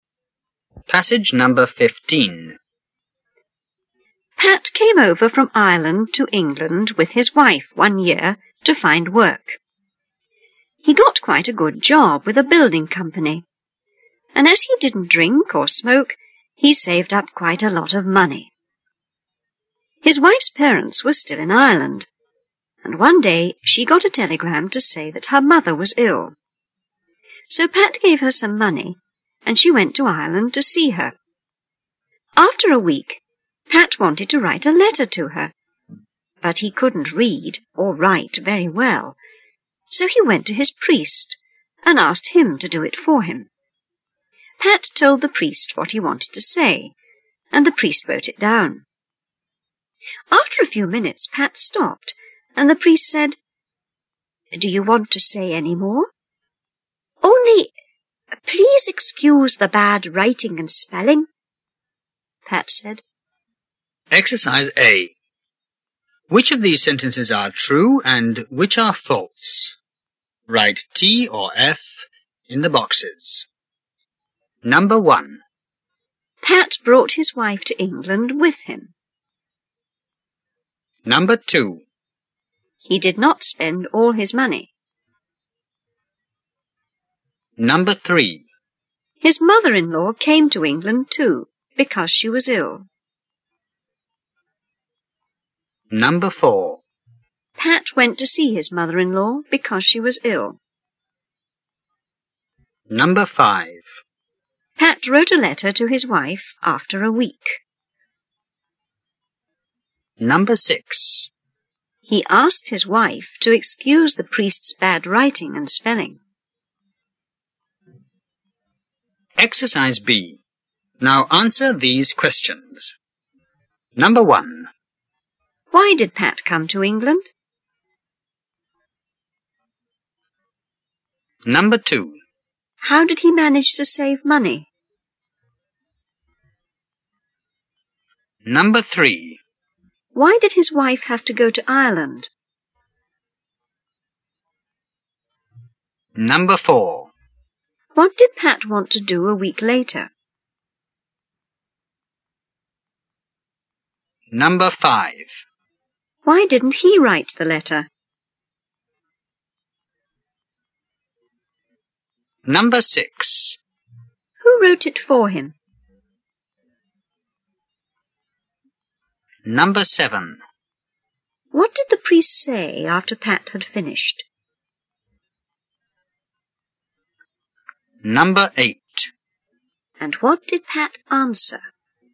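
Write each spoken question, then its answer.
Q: Why did Pat come to England?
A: To find work

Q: How did he manage to save money?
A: He didn't drink or smoke

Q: Why did his wife have to go to Ireland?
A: Her mother was ill

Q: What did Pat want to do a week later?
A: Write a letter to his wife

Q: Why didn't he write the letter?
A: He couldn't read or write very well

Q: Who wrote it for him?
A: The priest

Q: What did the priest say after Pat had finished?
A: Do you want to say any more?

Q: And what did Pat answer?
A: Only, please excuse the bad writing and spelling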